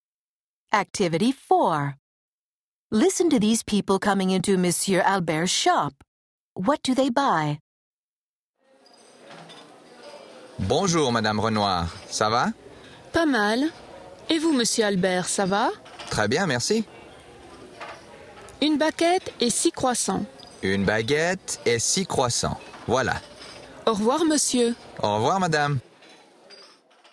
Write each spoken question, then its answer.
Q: What do they buy?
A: Madame Renoir came into his shop to buy a baguette.